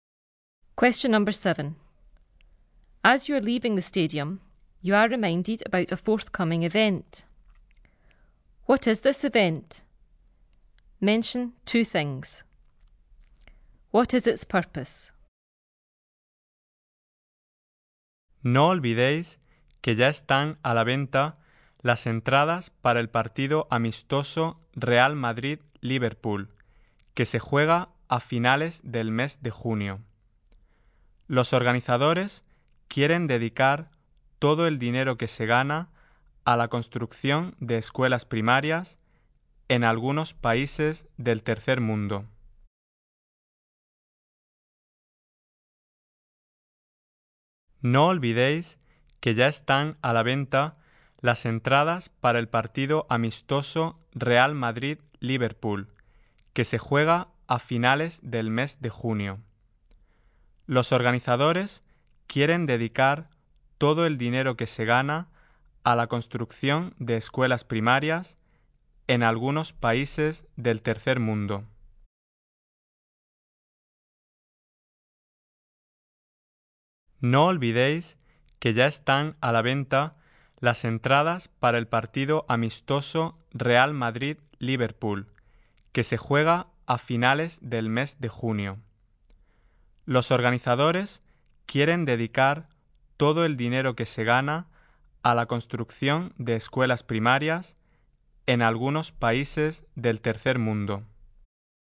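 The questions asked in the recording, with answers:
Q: What is this event? Mention 2 things.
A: A friendly match, Real Madrid v Liverpool, at the end of June

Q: What is its purpose?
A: To raise money to build primary schools in some developing countries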